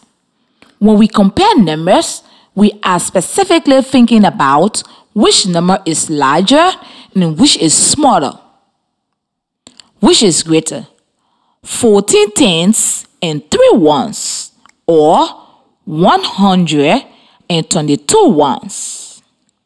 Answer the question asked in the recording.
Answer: Okay, 14 and 3 ones is greater.